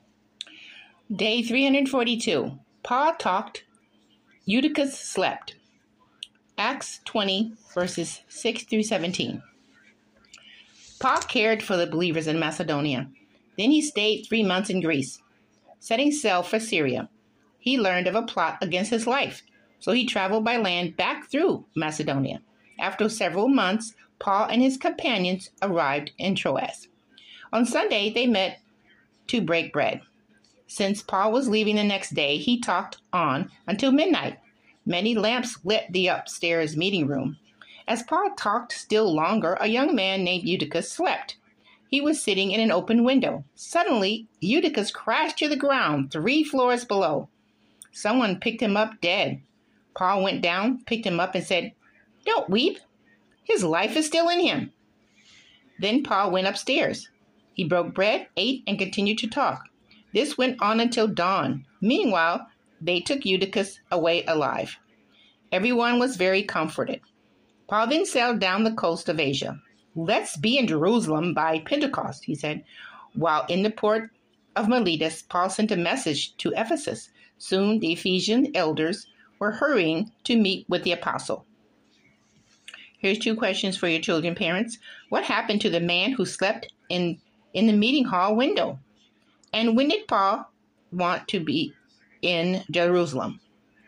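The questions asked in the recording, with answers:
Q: What happened to the man who slept in the meeting hall window?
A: He fell three floors to the ground and was picked up dead, but Paul brought him back to life

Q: And when did Paul want to be in Jerusalem?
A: By Pentecost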